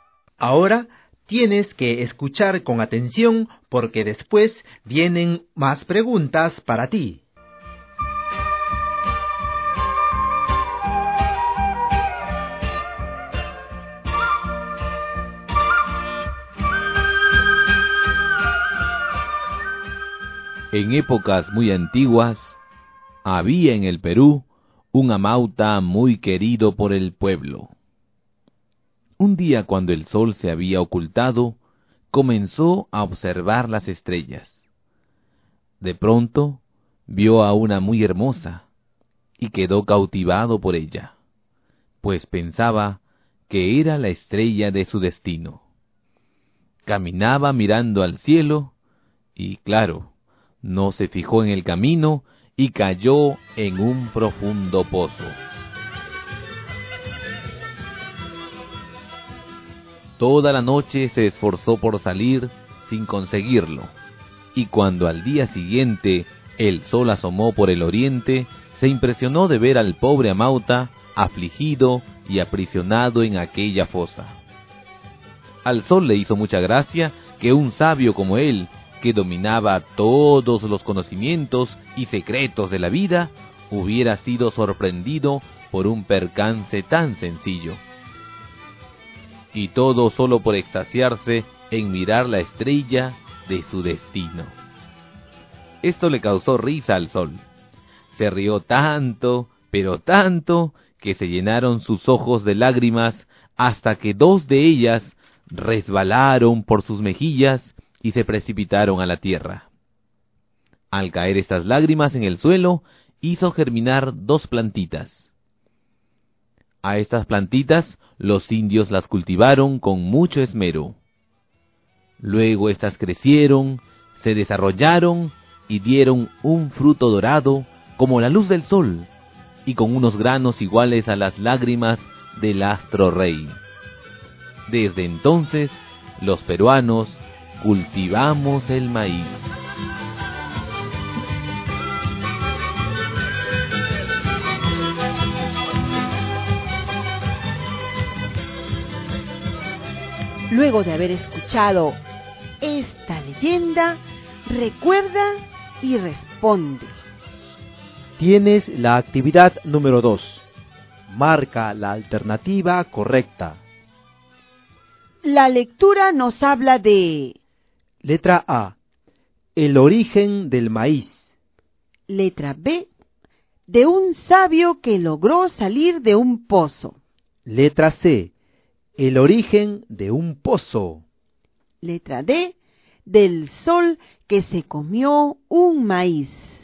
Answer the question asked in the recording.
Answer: El origen del maíz.